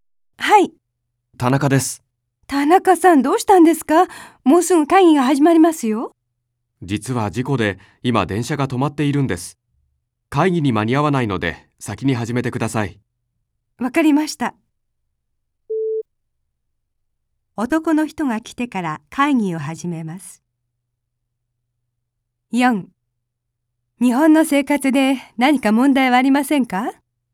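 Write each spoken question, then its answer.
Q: 男の人が来てから会議を始めます。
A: ×(先に始める)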